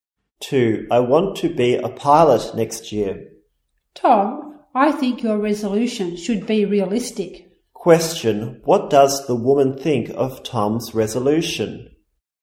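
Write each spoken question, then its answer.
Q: What does the woman think of Tom's resolution?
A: It should be realistic (being a pilot next year is not realistic).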